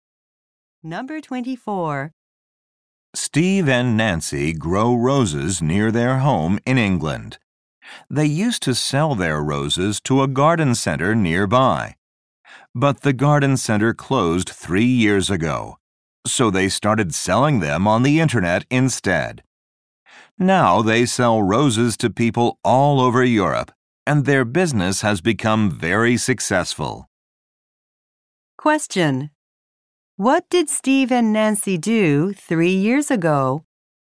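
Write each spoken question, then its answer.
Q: what did Steve and Nancy do 3 years ago?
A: Started selling roses on the internet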